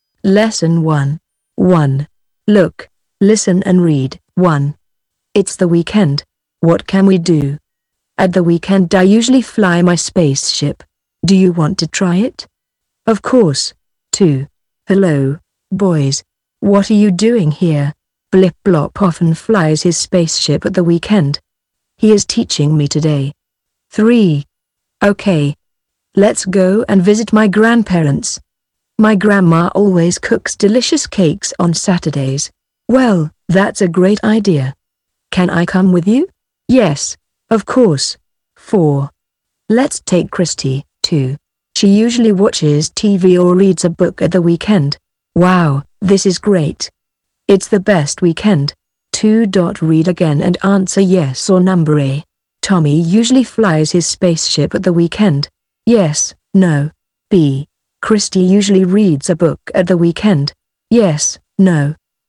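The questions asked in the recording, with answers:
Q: Tommy usually flies his spaceship at the weekend.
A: No

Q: Christy usually reads a book at the weekend.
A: Yes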